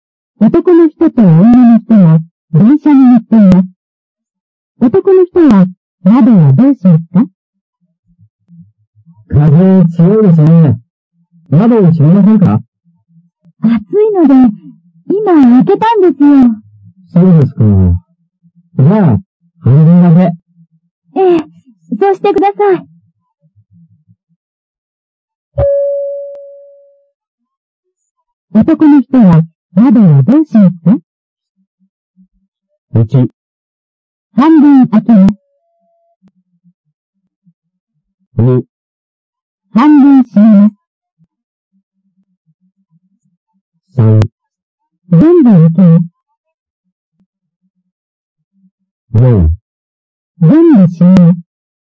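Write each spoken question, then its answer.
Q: 男の人は窓をどうしますか?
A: 2: 半分閉めます。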